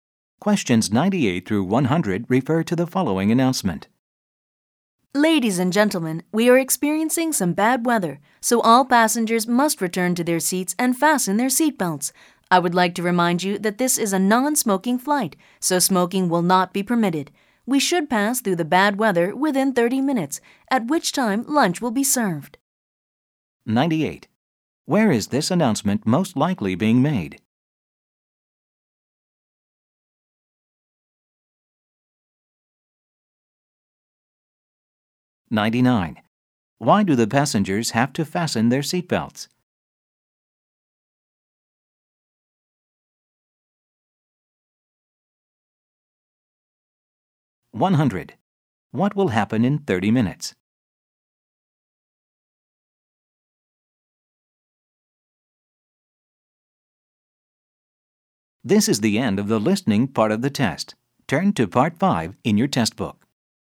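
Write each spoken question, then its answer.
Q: Where is this announcement most likely being made?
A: On an airplane

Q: Why do the passengers have to fasten their seatbelts?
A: Because of bad weather

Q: What will happen in 30 minutes?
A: Lunch will be served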